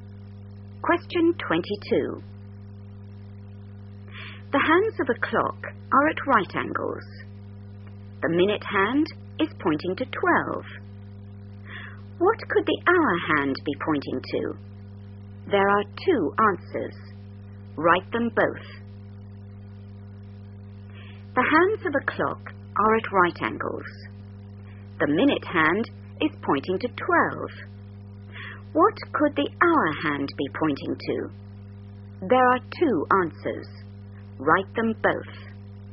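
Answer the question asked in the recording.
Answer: 3 or 9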